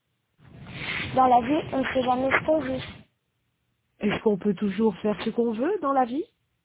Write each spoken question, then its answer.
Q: Est-ce qu'on peut toujours faire ce qu'on veut dans la vie?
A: Non. Dans la vie, on ne fait pas ce qu'on veut.